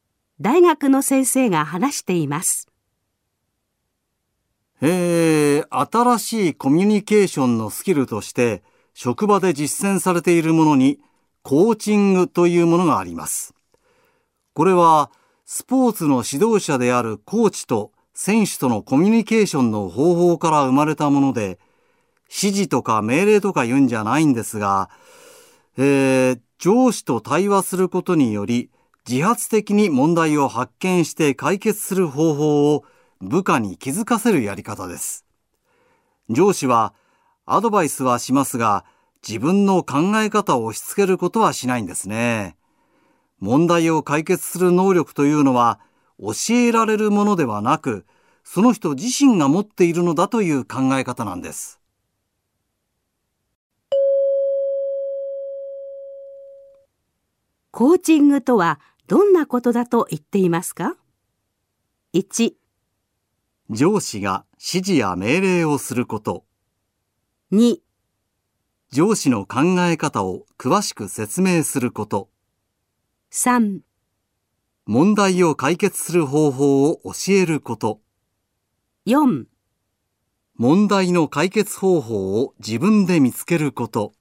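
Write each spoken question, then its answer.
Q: コーチングとはどんなことだと言っていますか?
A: 4: 問題の解決方法を自分で見つけること。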